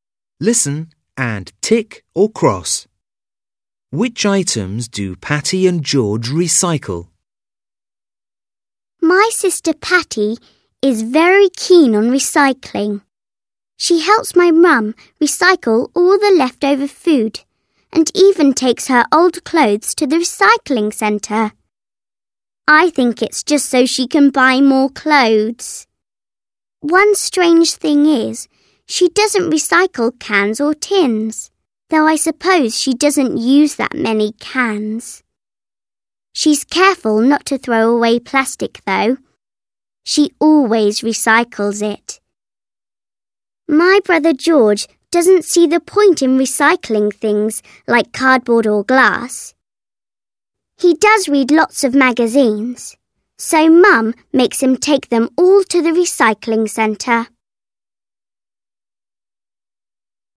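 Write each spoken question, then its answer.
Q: Which items do Patty and George recycle?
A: Patty recycles leftover food, clothes and plastic (not cans or tins); George recycles magazines (not cardboard or glass).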